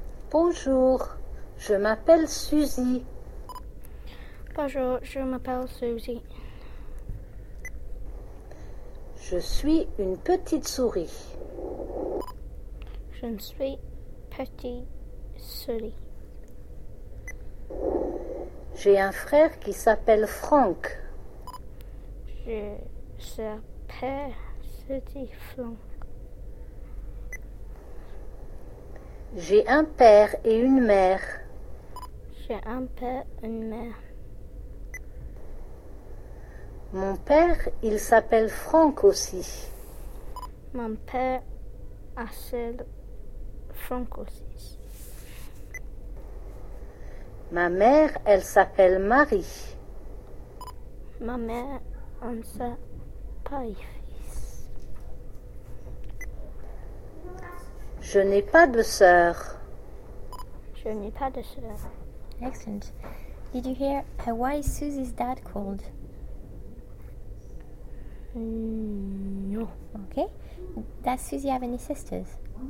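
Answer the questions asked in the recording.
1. Franck
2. No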